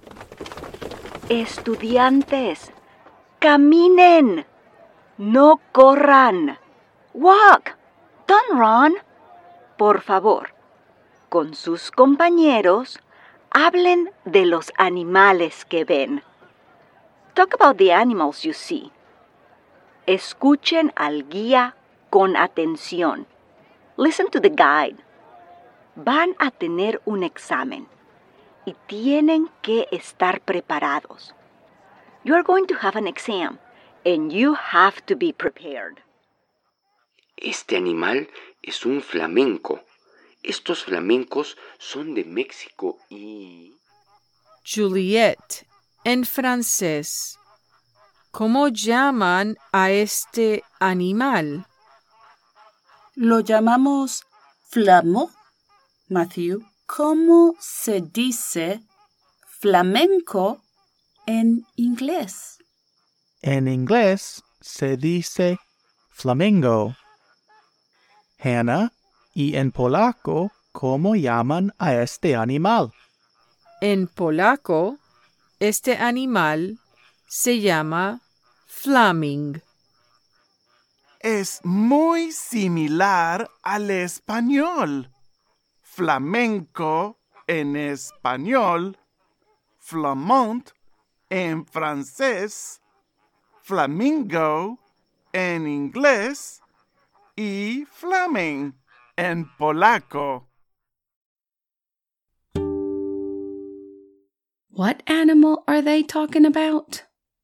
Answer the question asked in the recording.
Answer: Muy bien. A flamingo.